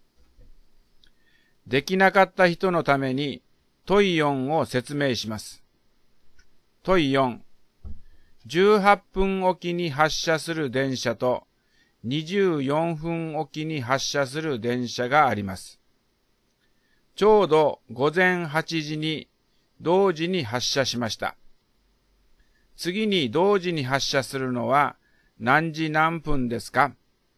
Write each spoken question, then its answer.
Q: 次に同時に発車するのは何時何分ですか?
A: だから答えは9時12分です。